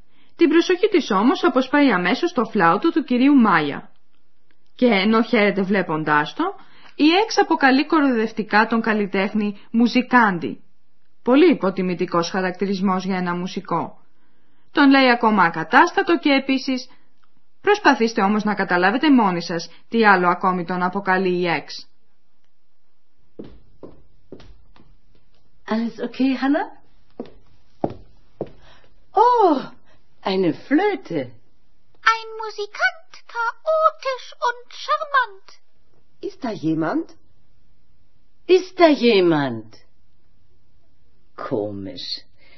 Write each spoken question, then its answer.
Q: Προσπαθήστε όμως να καταλάβετε μόνοι σας τι άλλο ακόμη τον αποκαλεί η Εξ.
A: Η Εξ αποκαλεί ακόμη τον νεαρό μουσικό γοητευτικό